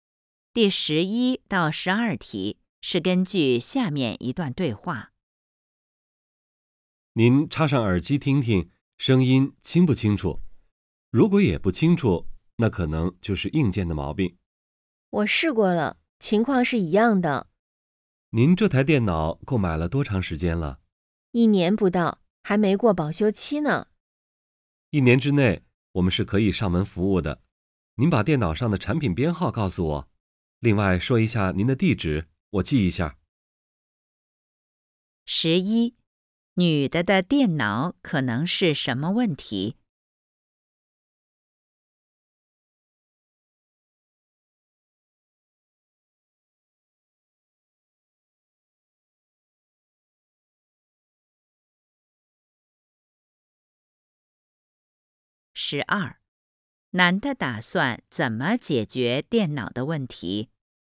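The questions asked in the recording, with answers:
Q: 女的的电脑可能是什么问题?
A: 硬件有毛病(声音不清楚)

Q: 男的打算怎么解决电脑的问题?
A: 上门服务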